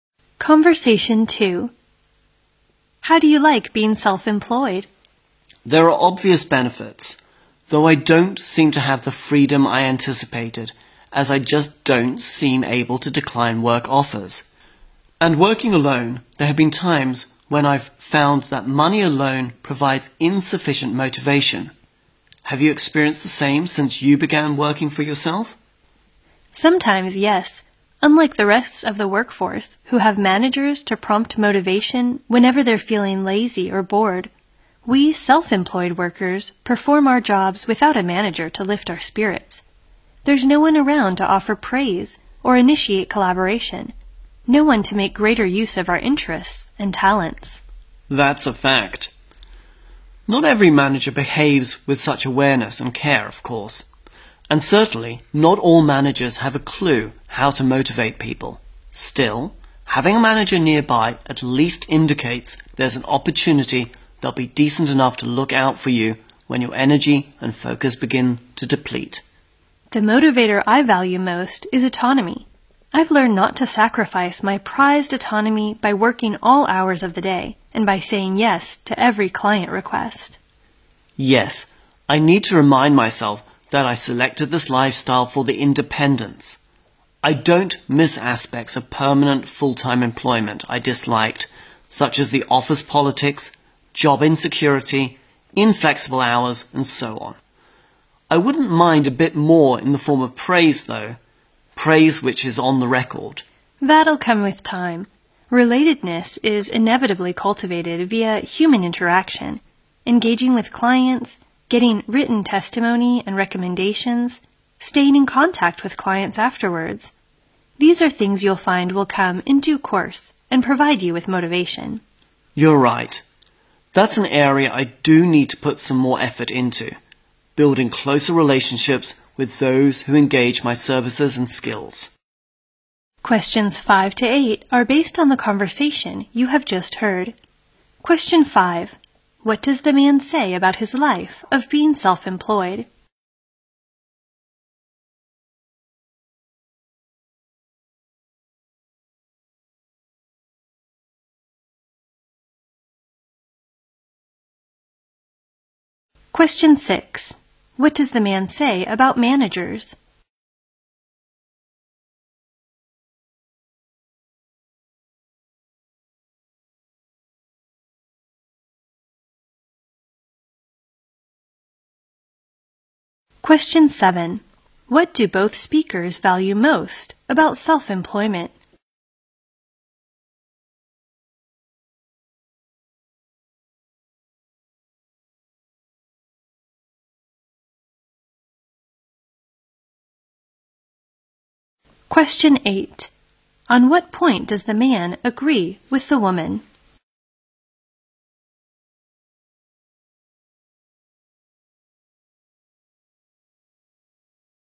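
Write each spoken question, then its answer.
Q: What do both speakers value most about self-employment?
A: Autonomy and independence

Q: On what point does the man agree with the woman?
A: He needs to build closer relationships with his clients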